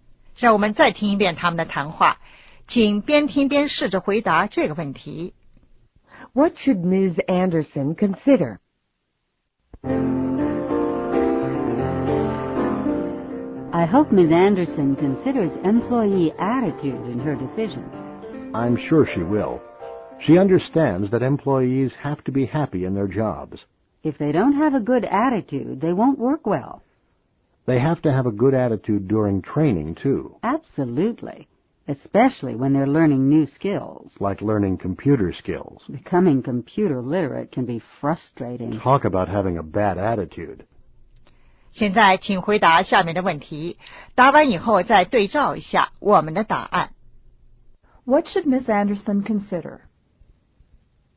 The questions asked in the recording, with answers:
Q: What should Ms. Anderson consider?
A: Employee attitude.